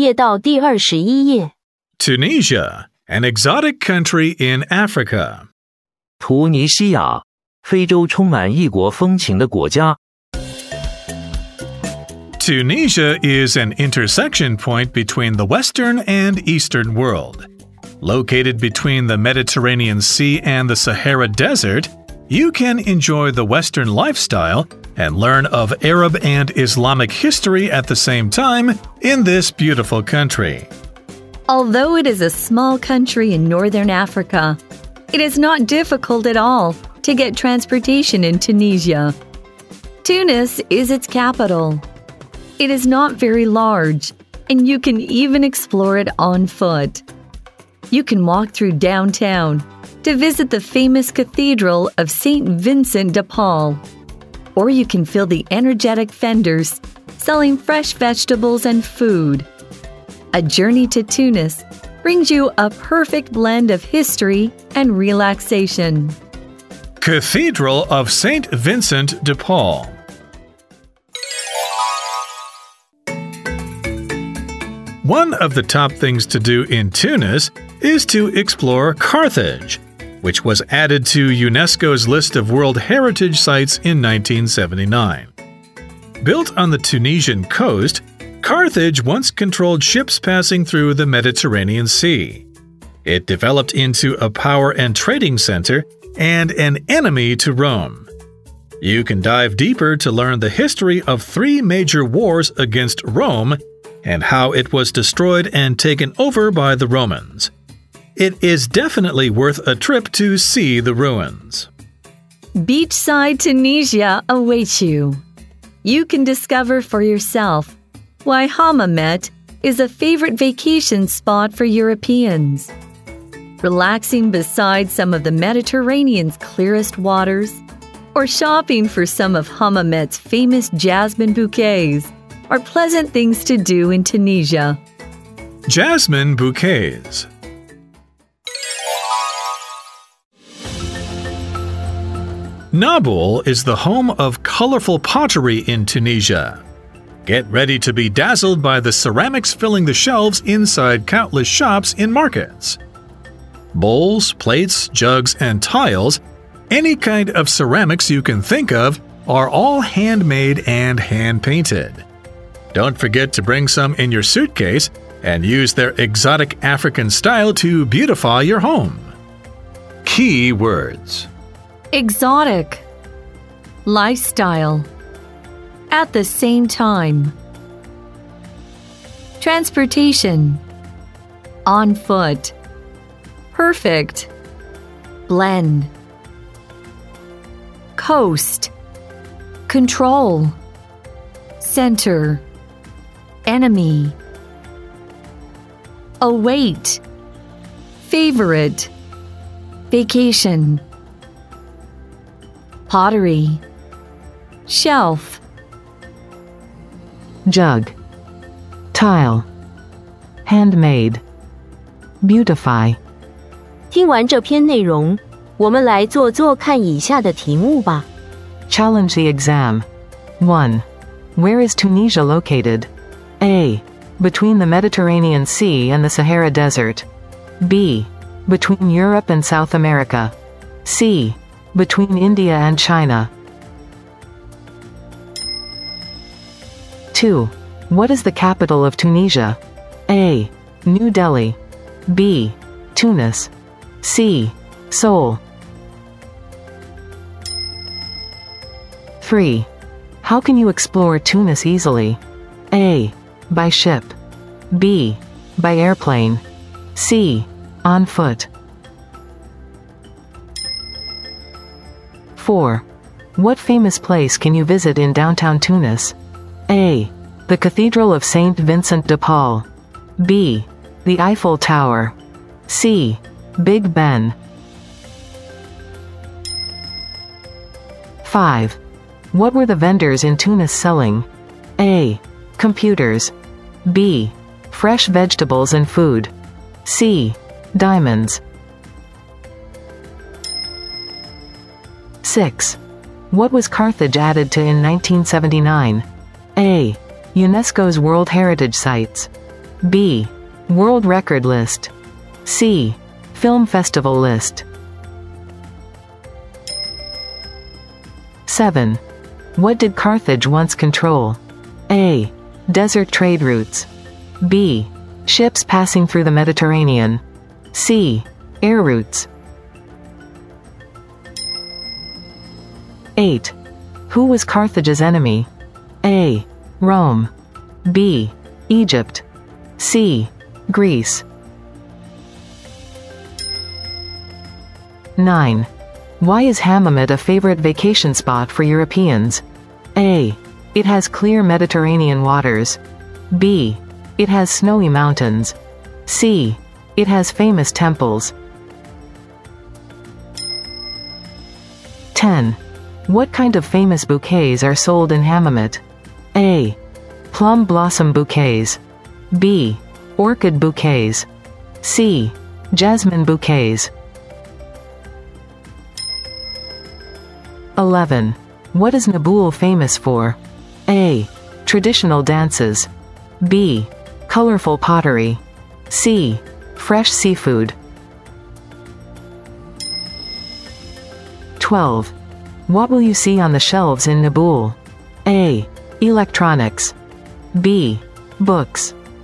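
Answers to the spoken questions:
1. A: Between the Mediterranean Sea and the Sahara Desert.
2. B: Tunis.
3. C: On foot.
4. A: The Cathedral of Saint Vincent de Paul.
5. B: Fresh vegetables and food.
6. A: UNESCO's World Heritage Sites.
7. B: Ships passing through the Mediterranean.
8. A: Rome.
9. A: It has clear Mediterranean waters.
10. C: Jasmine bouquets.
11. B: Colorful pottery.
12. C: Ceramics.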